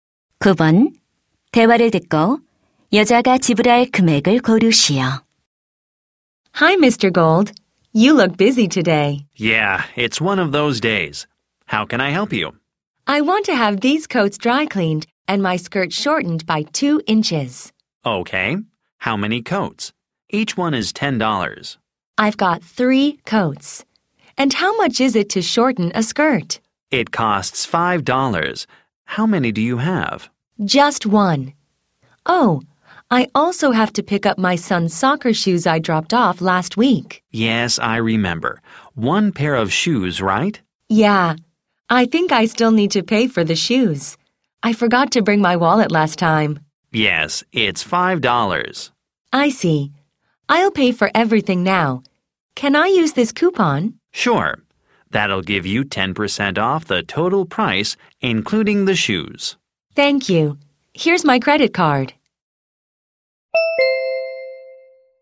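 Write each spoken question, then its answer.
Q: 대화를 듣고 여자가 지불할 금액을 고르시오.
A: 36달러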